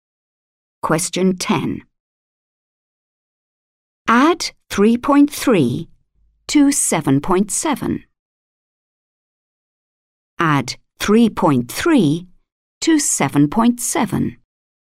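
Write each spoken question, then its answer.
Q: Add 3.3 to 7.7.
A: 11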